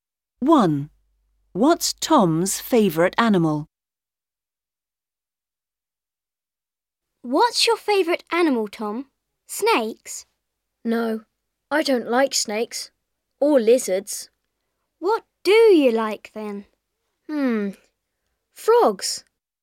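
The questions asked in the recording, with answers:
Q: What's Tom's favourite animal?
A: Frogs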